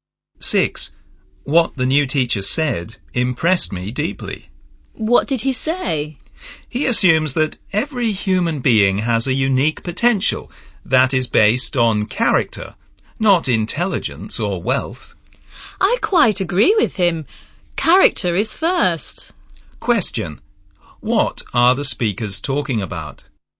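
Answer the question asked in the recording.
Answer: What the new teacher said: everyone's potential is based on character, not intelligence or wealth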